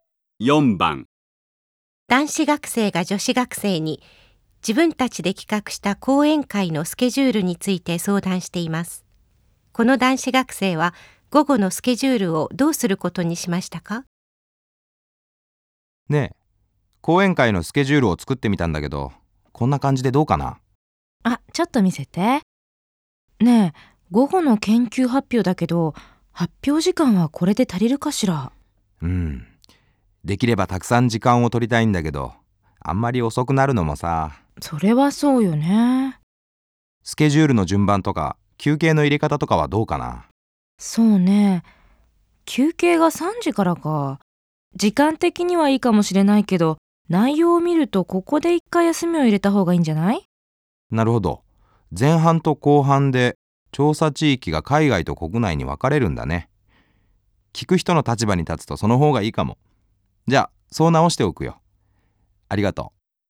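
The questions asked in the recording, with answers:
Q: この男子学生は午後のスケジュールをどうすることにしましたか?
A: 休憩を、海外と国内の調査地域の発表の間に入れるように変える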